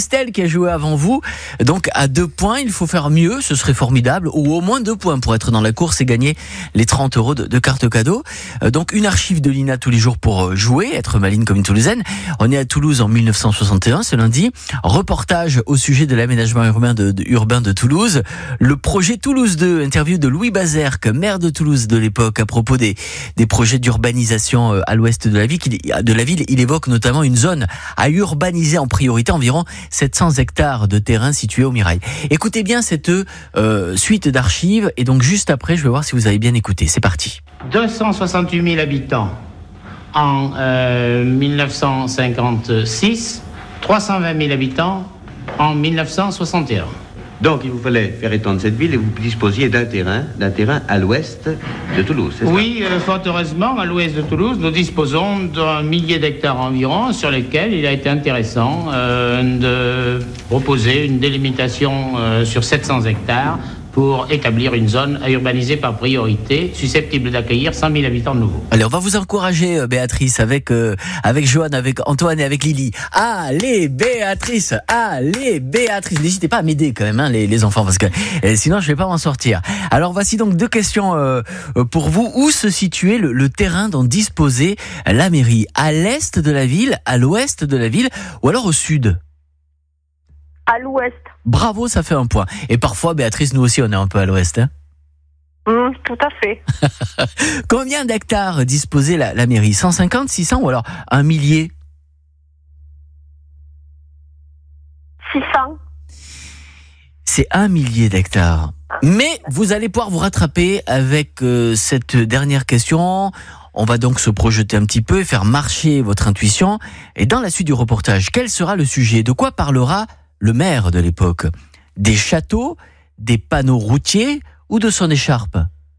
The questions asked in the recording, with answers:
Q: Combien d'hectares disposait la mairie ?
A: C'est 1 000 000 d'hectares.